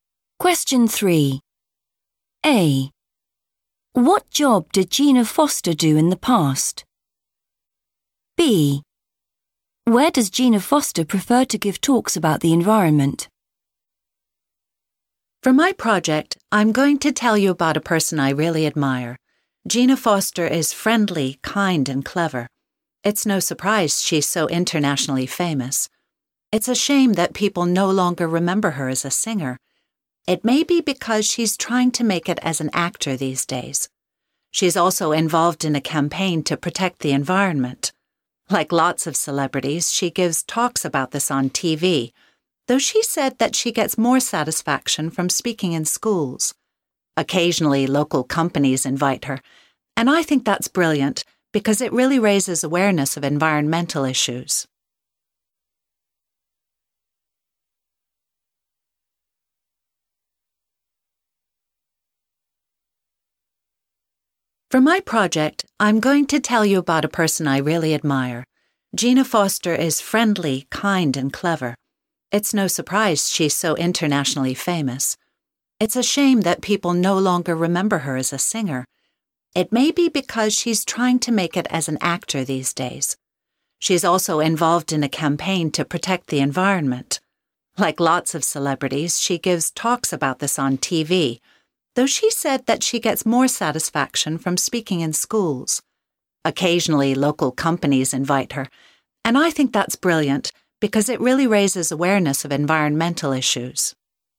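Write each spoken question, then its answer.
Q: What job did Gina Foster do in the past?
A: singer

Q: Where does Gina Foster prefer to give talks about the environment?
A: in schools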